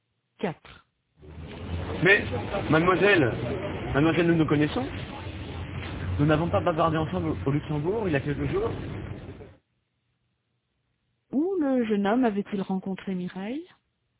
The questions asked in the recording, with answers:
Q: Où le jeune homme avait-il rencontré Mireille?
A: Au Luxembourg.